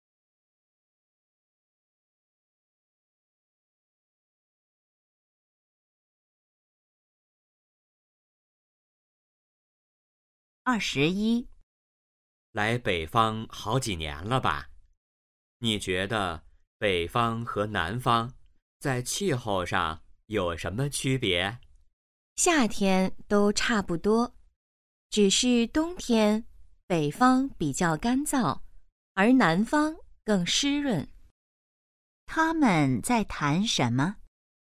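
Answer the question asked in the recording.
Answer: 南北方气候的区别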